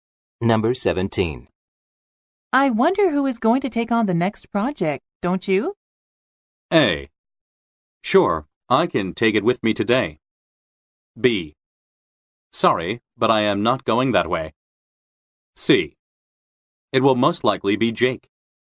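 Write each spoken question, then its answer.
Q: I wonder who is going to take on the next project, don't you?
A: C: It will most likely be Jake.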